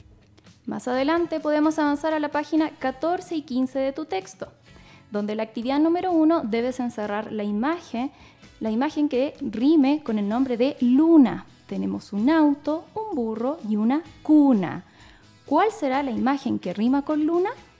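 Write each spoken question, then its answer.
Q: ¿Cuál será la imagen que rima con luna?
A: una cuna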